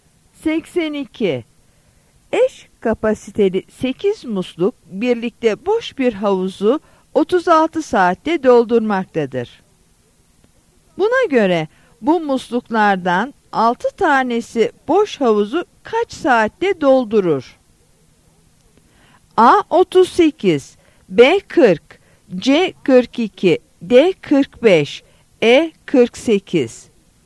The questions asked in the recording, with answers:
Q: Buna göre bu musluklardan 6 tanesi boş havuzu kaç saatte doldurur?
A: Yanıt E.